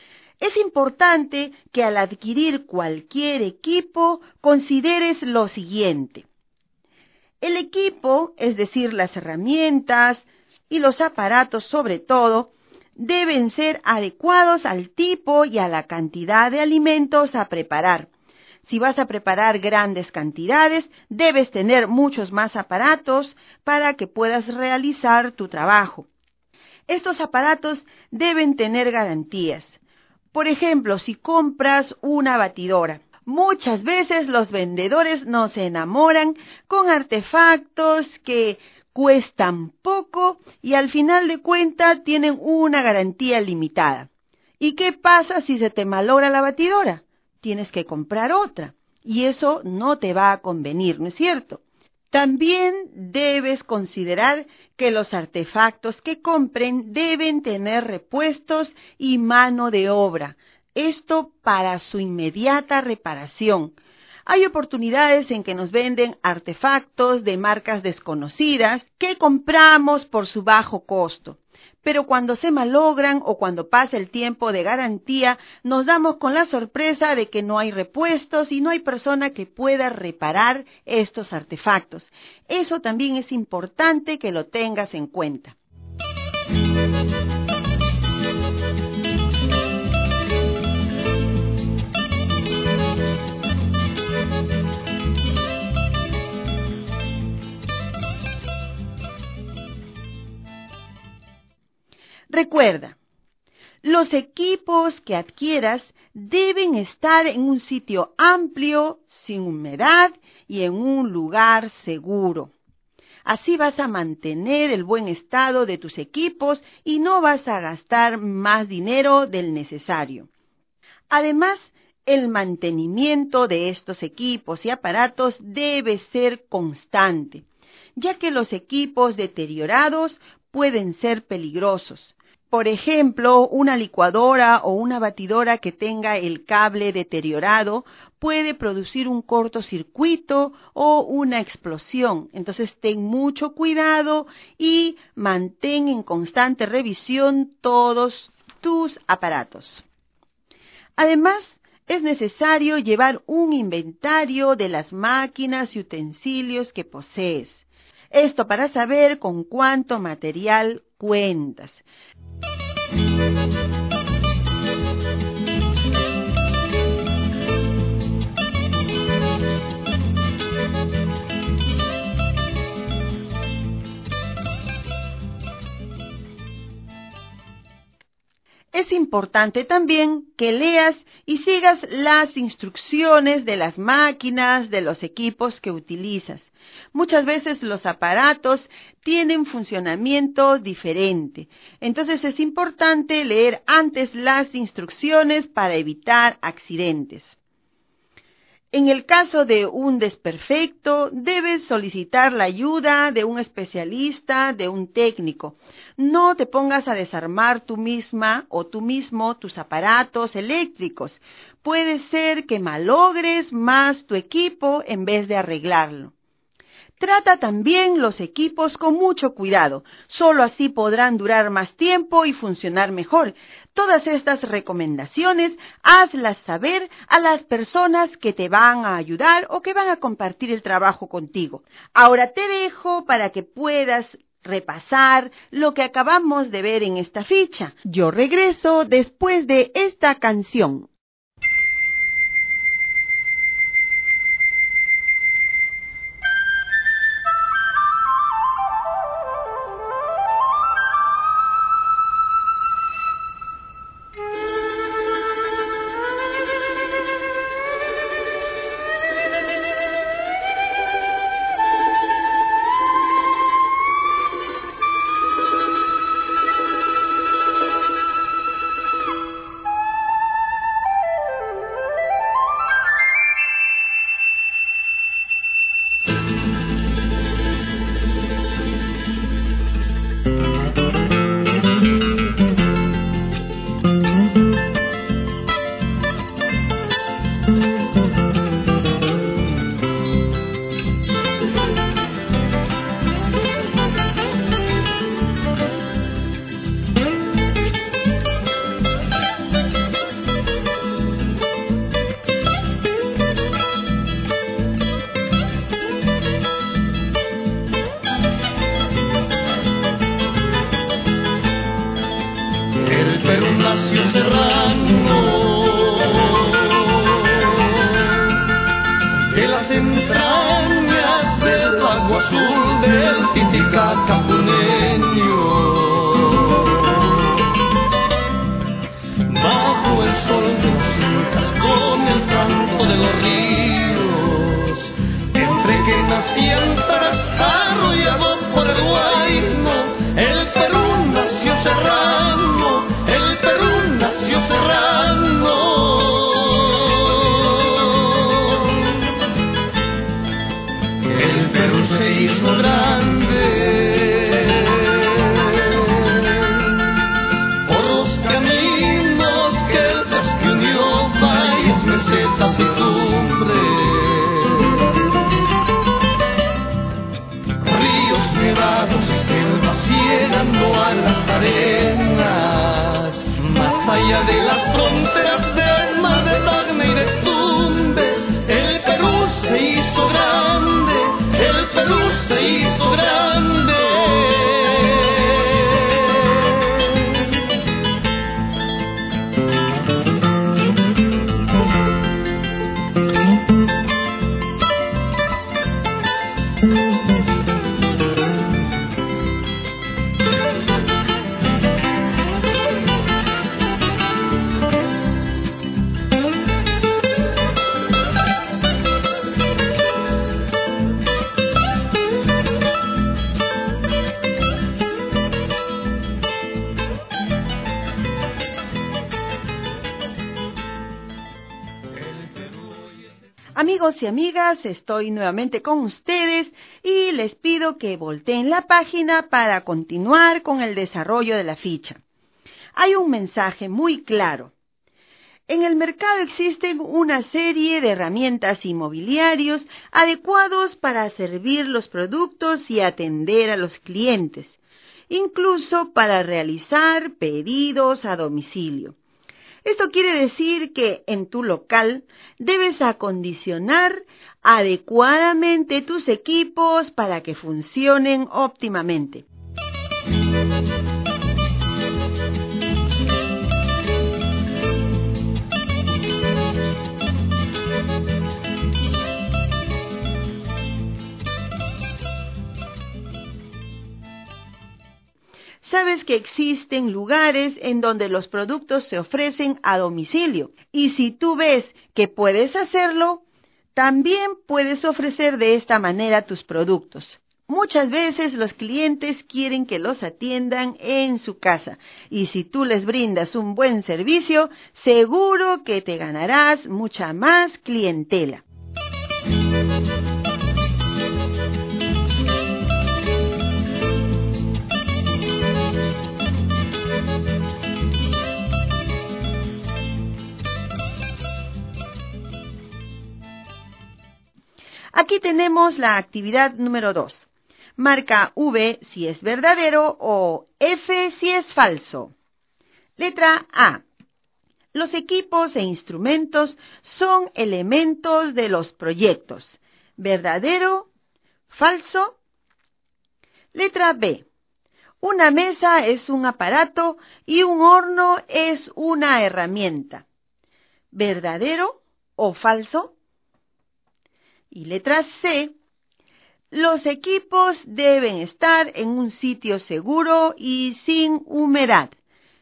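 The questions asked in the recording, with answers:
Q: los equipos deben estar en un sitio seguro y sin humedad.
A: Verdadero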